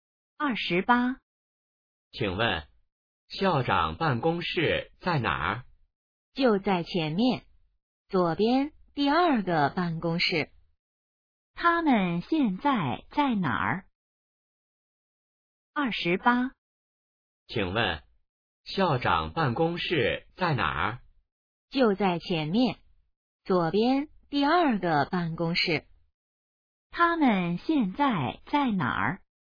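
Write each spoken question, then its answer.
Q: 他们现在在哪儿?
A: 学校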